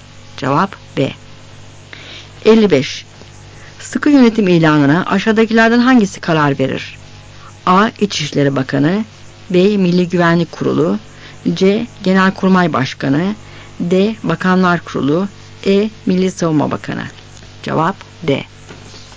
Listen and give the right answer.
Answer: Cevap D.